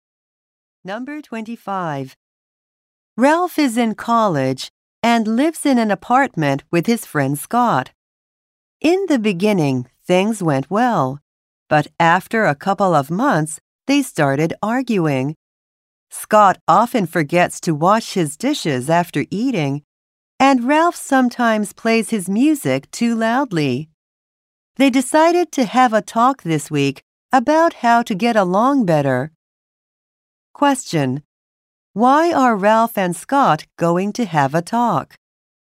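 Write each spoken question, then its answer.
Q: Why are Ralph and Scott going to have a talk?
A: They have been arguing and want to get along better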